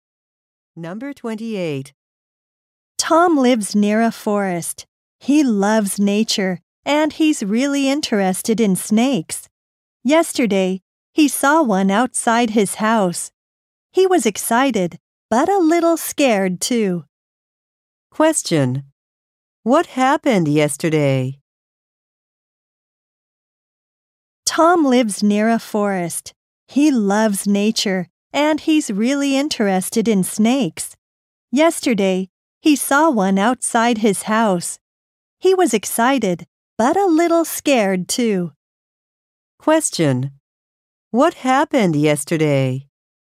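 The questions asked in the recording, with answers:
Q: What happened yesterday?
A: Tom saw a snake outside his house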